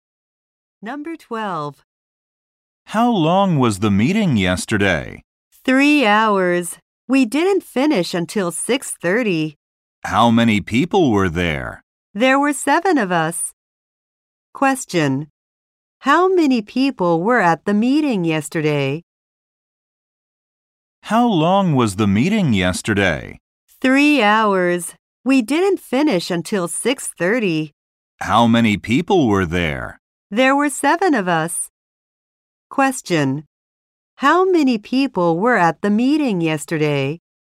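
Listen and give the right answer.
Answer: Seven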